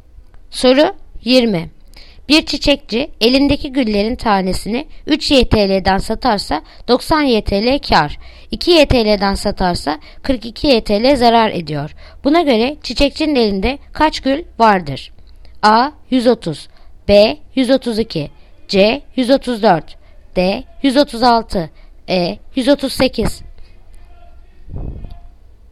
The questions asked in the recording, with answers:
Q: Buna göre çiçekçinin elinde kaç gül vardır?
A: Yanıt Bursa 132